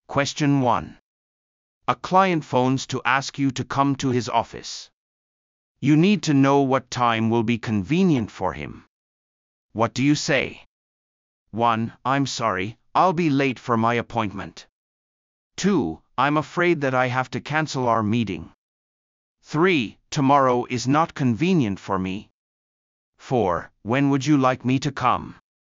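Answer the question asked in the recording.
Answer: 4: When would you like me to come?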